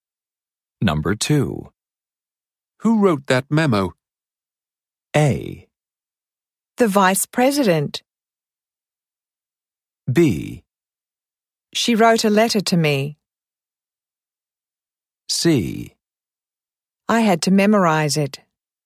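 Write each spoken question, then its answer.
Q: Who wrote that memo?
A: A: The vice president.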